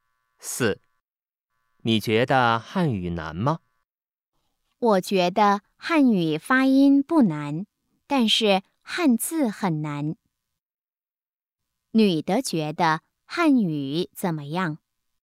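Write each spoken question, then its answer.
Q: 女的觉得汉语怎么样?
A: 发音不难,汉字很难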